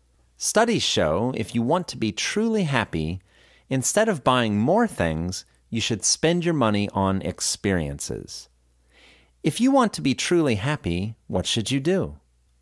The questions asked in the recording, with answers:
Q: If you want to be truly happy, what should you do?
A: If you want to be truly happy, you should spend your money on experiences instead of on buying things.